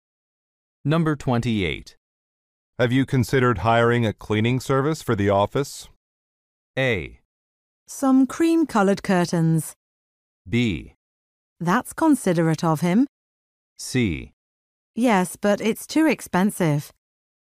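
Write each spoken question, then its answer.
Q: Have you considered hiring a cleaning service for the office?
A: C: Yes, but it's too expensive.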